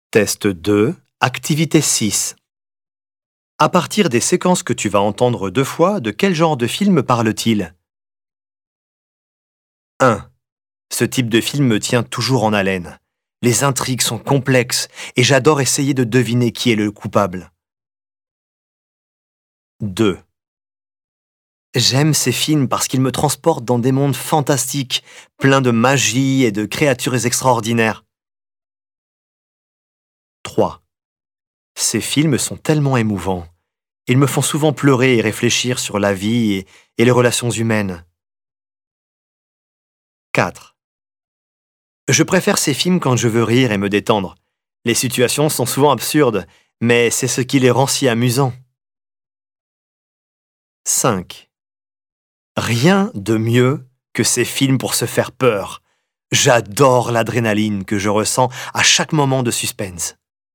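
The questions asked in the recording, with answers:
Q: de quel genre de film parle-t-il?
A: un film policier

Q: de quel genre de film parle-t-il?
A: un film fantastique

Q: de quel genre de film parle-t-il?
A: un drame

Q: de quel genre de film parle-t-il?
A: une comédie

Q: de quel genre de film parle-t-il?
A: un film d'horreur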